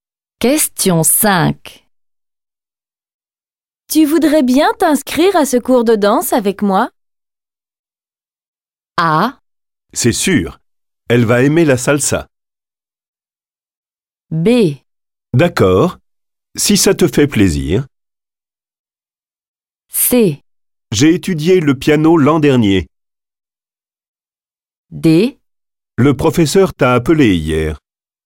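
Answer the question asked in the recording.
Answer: B: D'accord, si ça te fait plaisir.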